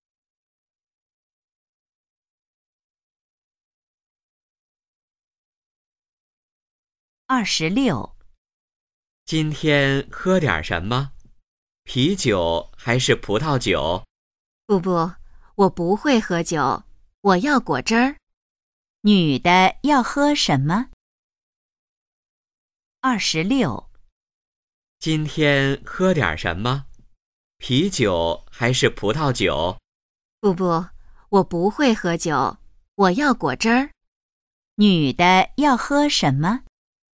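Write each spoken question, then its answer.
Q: 女的要喝什么?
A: 果汁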